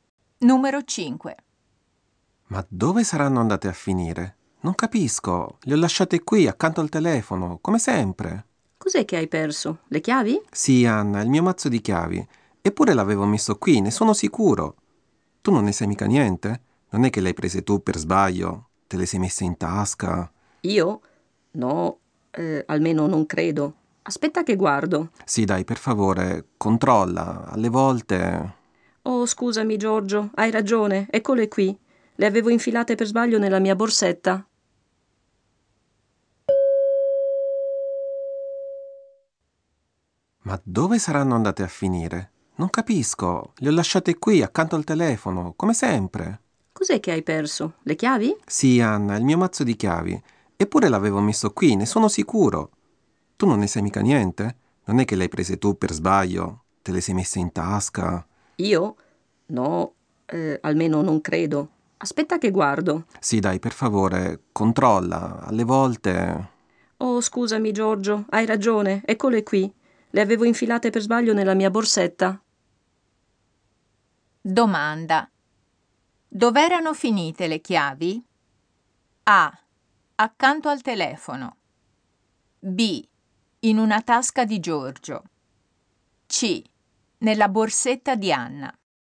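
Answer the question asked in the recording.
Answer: C: Nella borsetta di Anna.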